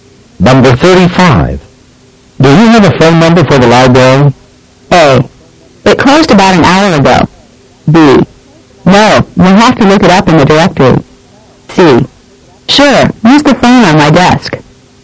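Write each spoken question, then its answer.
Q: Do you have a phone number for the library?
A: B: No, we'll have to look it up in the directory.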